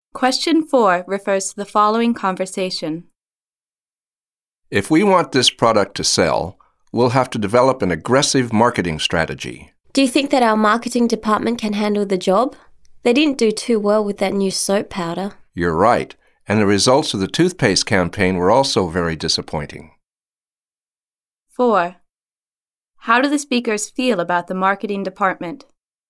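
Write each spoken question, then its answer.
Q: How do the speakers feel about the marketing department?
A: They doubt it can handle the job (its past campaigns were disappointing)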